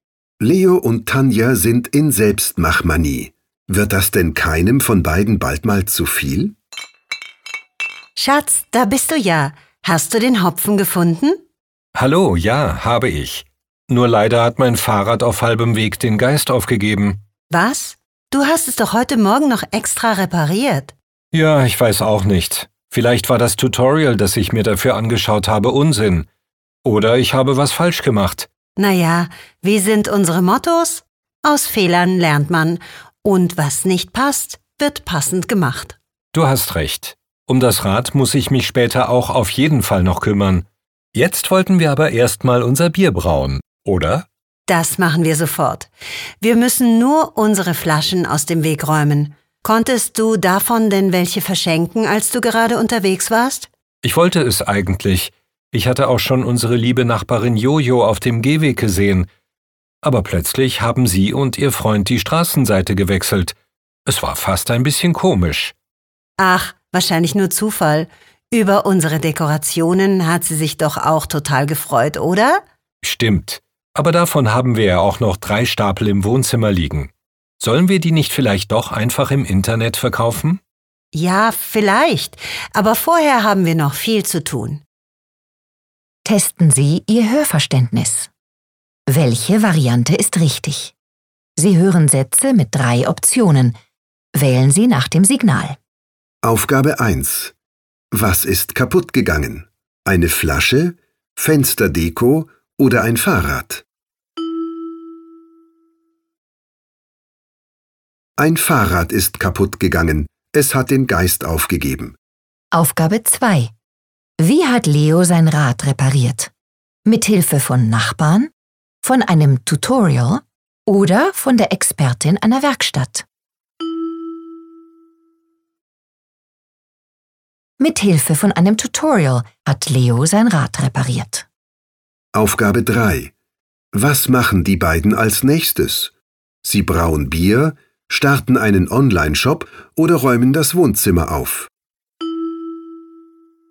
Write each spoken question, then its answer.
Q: Was ist kaputt gegangen?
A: Ein Fahrrad ist kaputt gegangen.

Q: Wie hat Leo sein Rad repariert?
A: Mithilfe von einem Tutorial hat Leo sein Rad repariert.

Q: Was machen die beiden als nächstes?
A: Als nächstes brauen Leo und Tanja Bier.